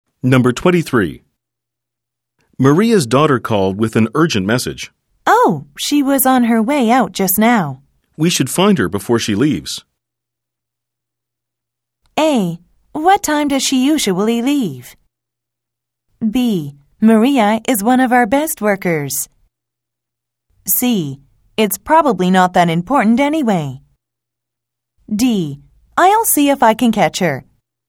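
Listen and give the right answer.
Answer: D: I'll see if I can catch her.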